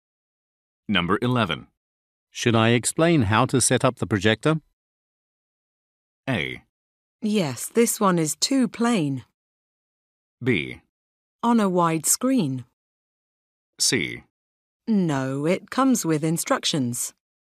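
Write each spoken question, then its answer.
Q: Should I explain how to set up the projector?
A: C: No, it comes with instructions.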